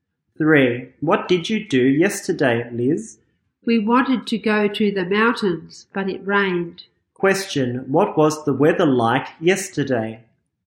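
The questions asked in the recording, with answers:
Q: What was the weather like yesterday?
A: Rainy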